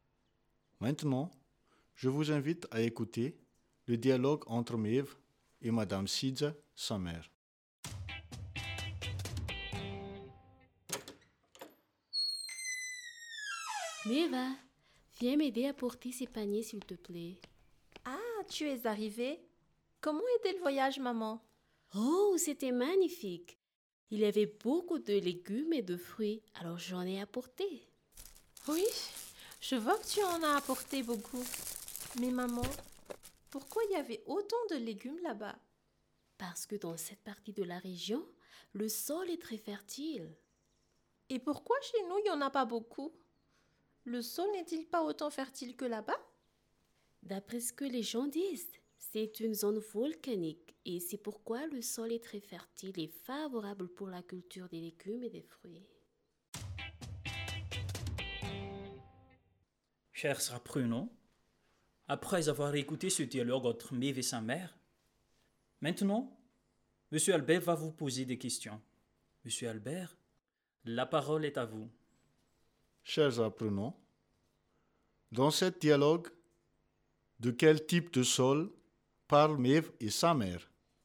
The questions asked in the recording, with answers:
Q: Chers apprenants, dans ce dialogue, de quel type de sol parlent Mev et sa mère?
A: Très bien, elle parle du sol volcanique.